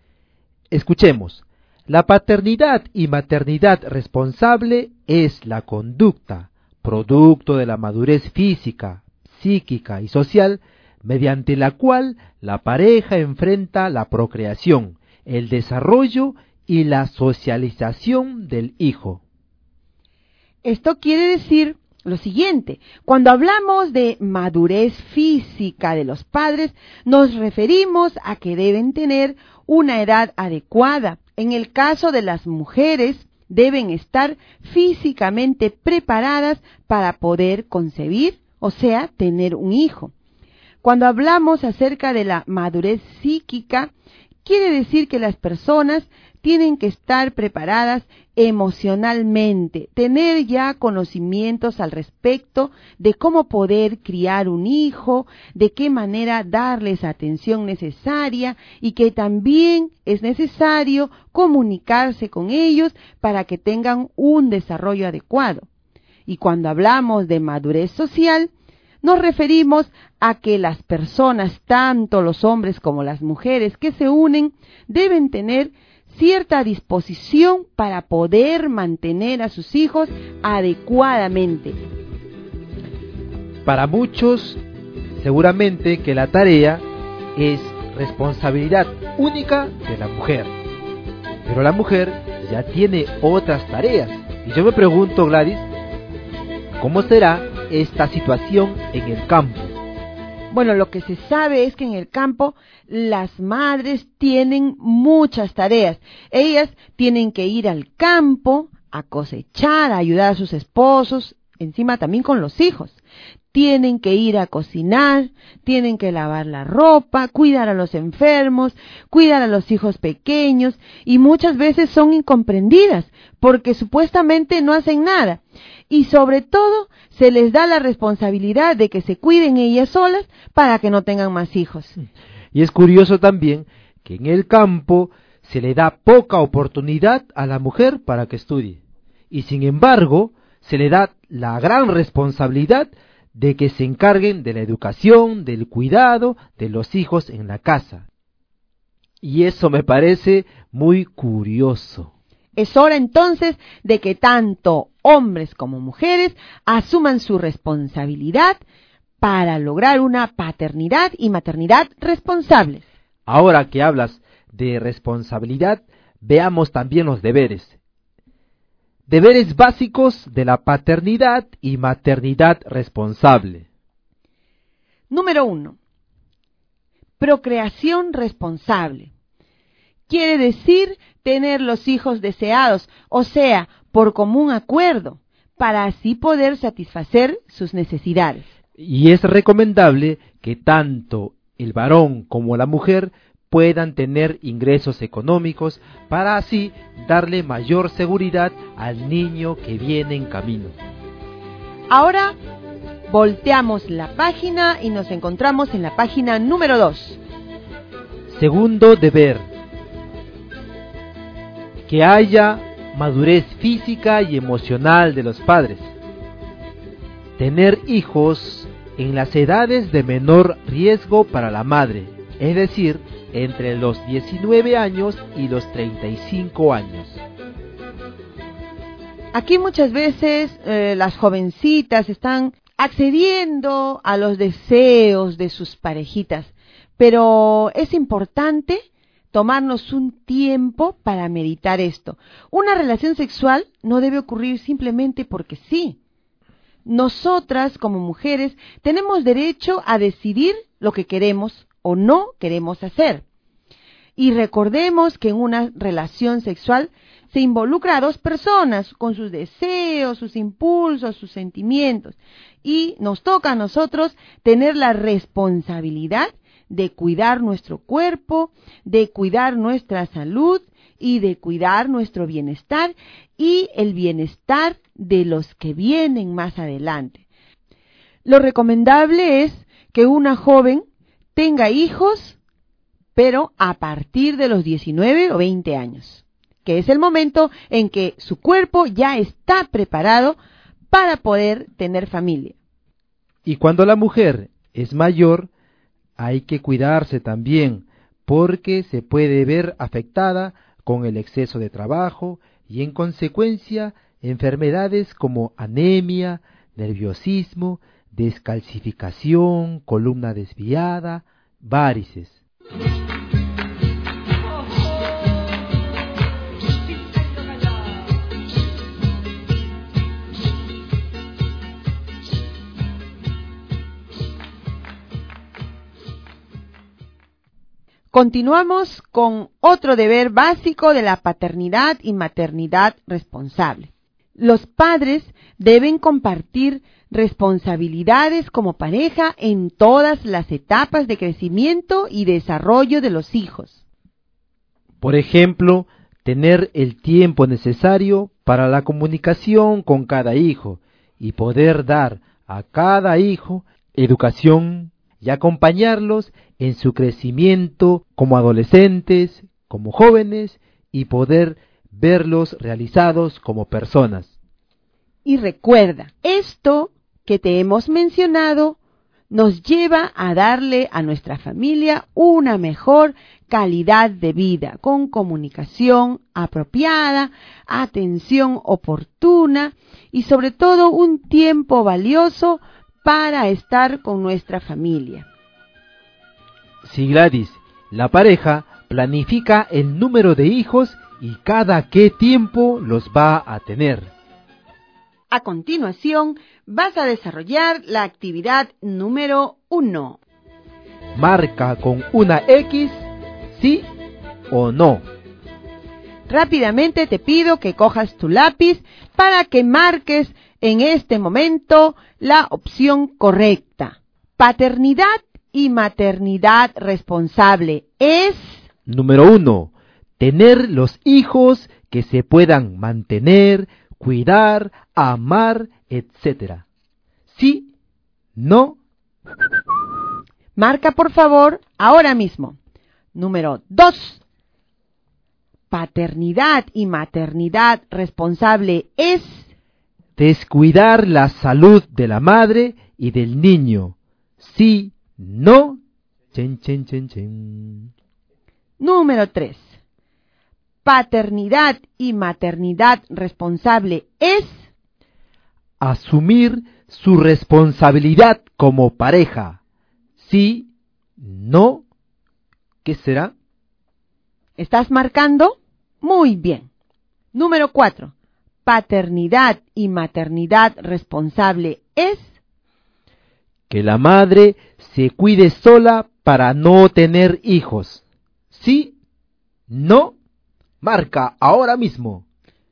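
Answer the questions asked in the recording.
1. Sí
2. No
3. Sí
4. No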